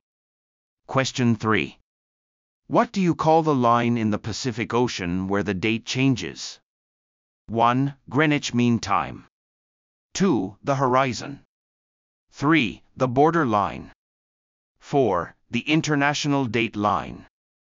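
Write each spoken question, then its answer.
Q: What do you call the line in the Pacific Ocean where the date changes?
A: 4: The international date line.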